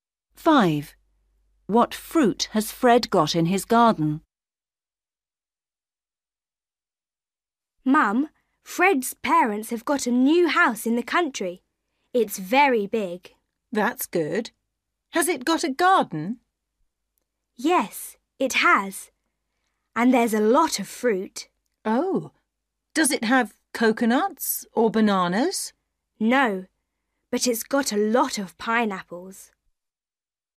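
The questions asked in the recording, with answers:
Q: What fruit has Fred got in his garden?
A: pineapples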